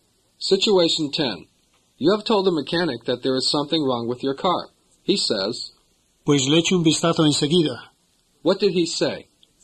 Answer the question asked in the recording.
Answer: He said, I'll take a look right away.